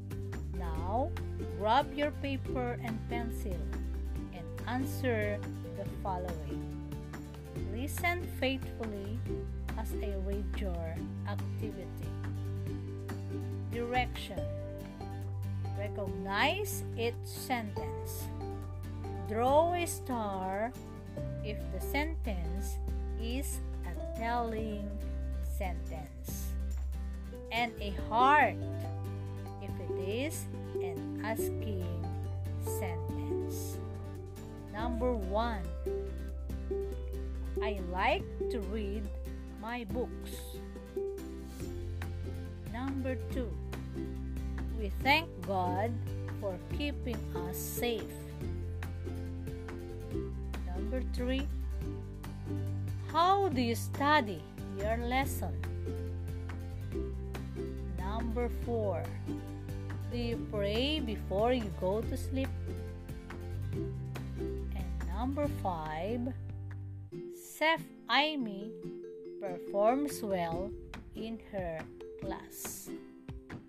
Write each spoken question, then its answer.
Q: I like to read my books.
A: Star.

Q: We thank God for keeping us safe.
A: Heart.

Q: how do you study your lesson?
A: Heart.

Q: do you pray before you go to sleep?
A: Heart.

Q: Chef Amy performs well in her class.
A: Star.